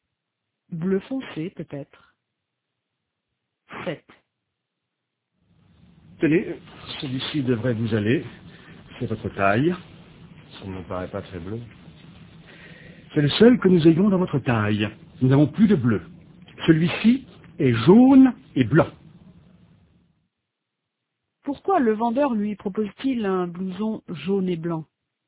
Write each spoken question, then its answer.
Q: Pourquoi le vendeur lui propose-t-il un blouson jaune et blanc?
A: Parce qu'ils n'ont plus de bleu.